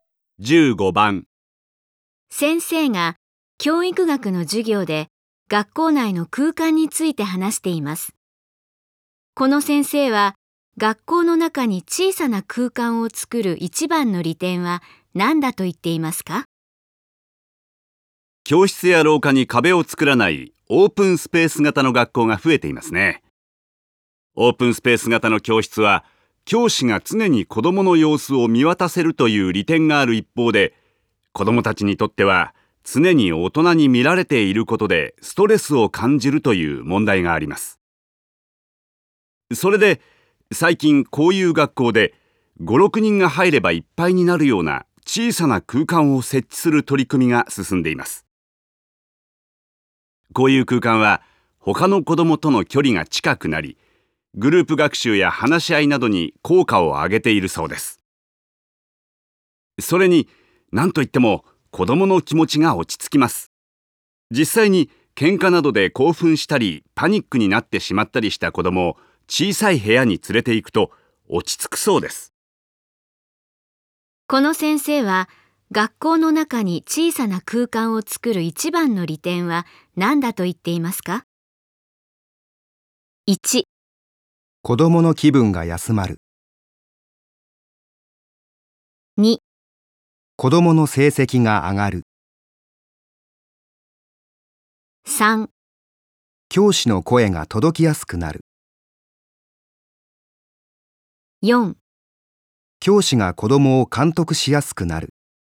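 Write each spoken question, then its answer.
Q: この先生は学校の中に小さな空間を作る一番の利点は何だと言っていますか?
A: 1: 子どもの気分が休まる。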